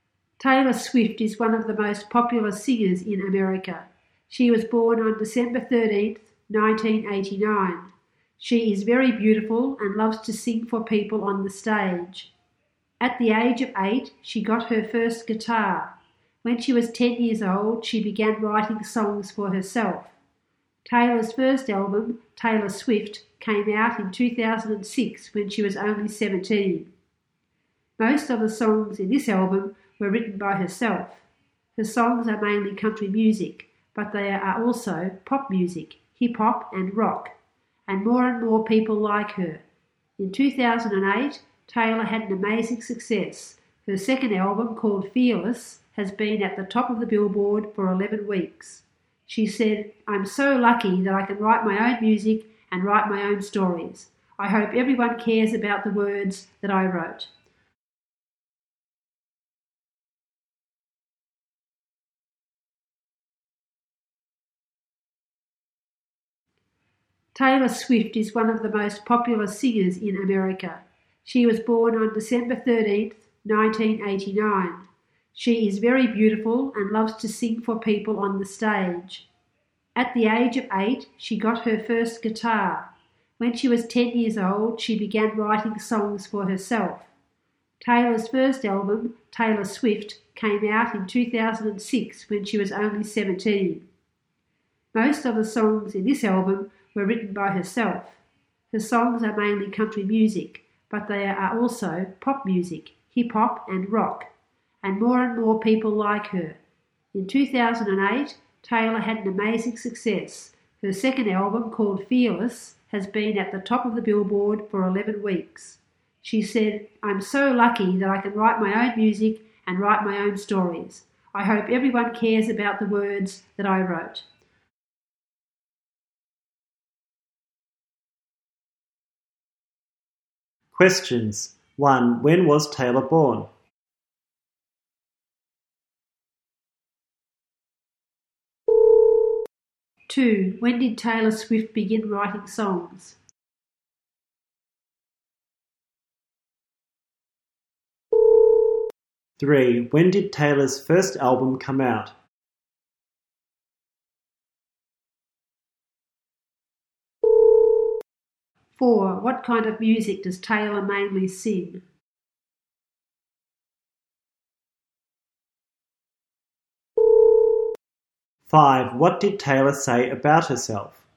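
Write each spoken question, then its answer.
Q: When was Taylor born?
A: On December 13, 1989

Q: When did Taylor's first album come out?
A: In 2006

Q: What kind of music does Taylor mainly sing?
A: Country music

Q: What did Taylor say about herself?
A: She is lucky that she can write her own music and stories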